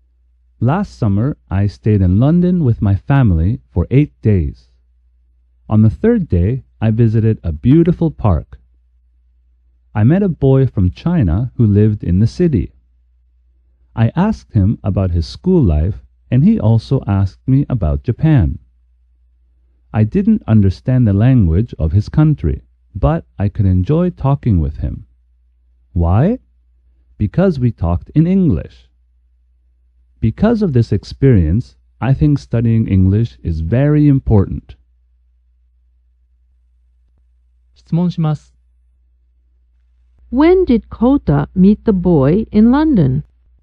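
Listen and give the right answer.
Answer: On the third day.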